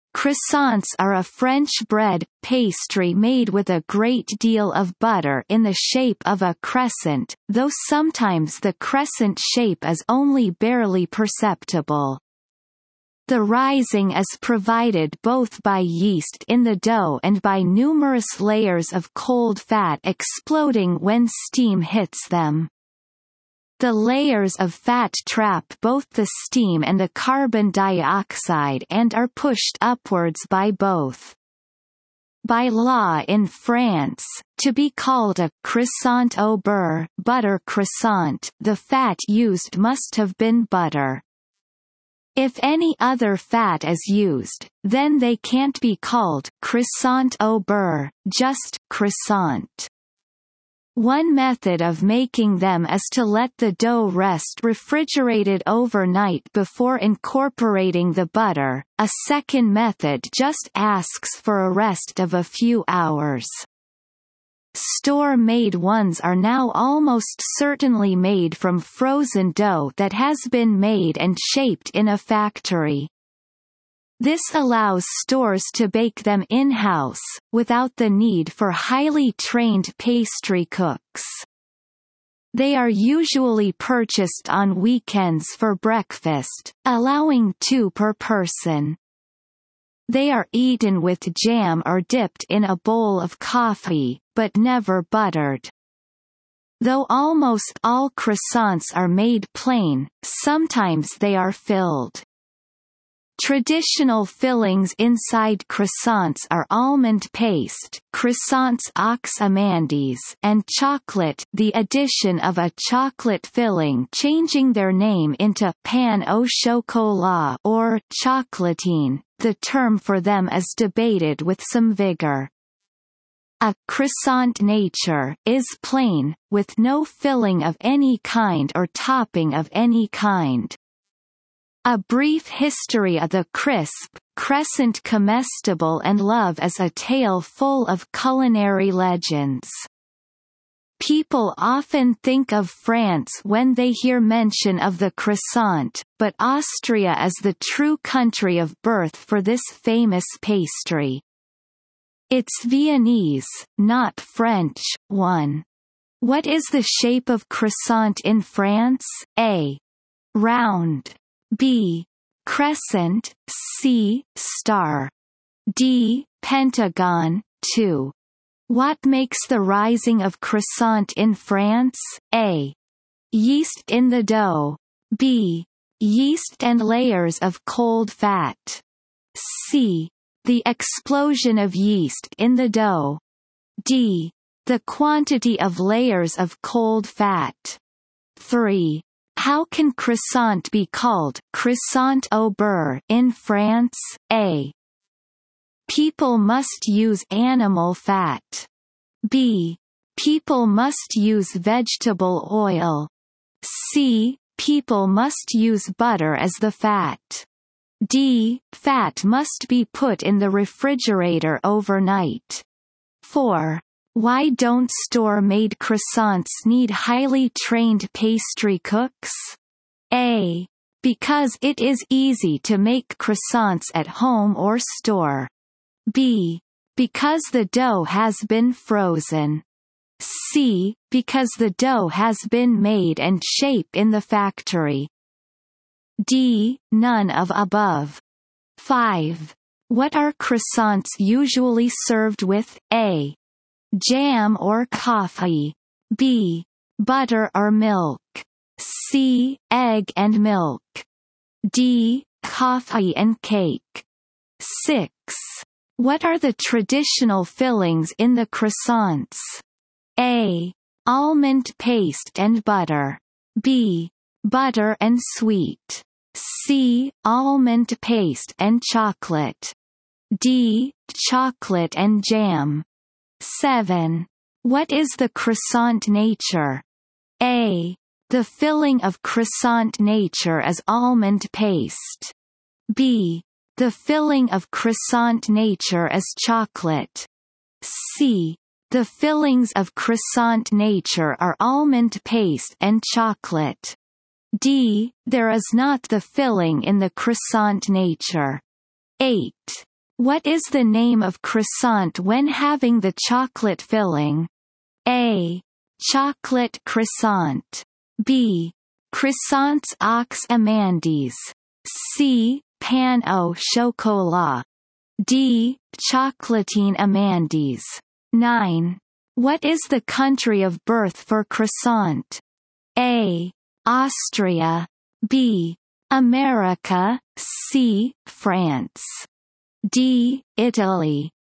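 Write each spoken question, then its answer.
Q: What is the shape of croissant in France?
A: B: Crescent

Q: What makes the rising of croissant in France?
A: B: Yeast and layers of cold fat.

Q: How can croissant be called croissant au beurre in France?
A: C: People must use butter as the fat.

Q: Why don't store-made croissants need highly trained pastry cooks?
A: C: Because the dough has been made and shaped in the factory.

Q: What are croissants usually served with?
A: A: Jam or coffee.

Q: What are the traditional fillings in the croissants?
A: C: Almond paste and chocolate.

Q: What is the croissant nature?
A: D: There is not the filling in the croissant nature.

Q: What is the name of croissant when having the chocolate filling?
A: C: Pain au chocolat.

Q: What is the country of birth for croissant?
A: A: Austria.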